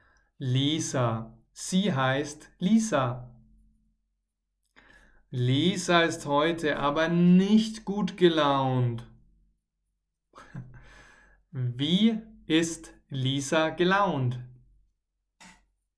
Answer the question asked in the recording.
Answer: Nicht gut. Sie ist nicht gut gelaunt.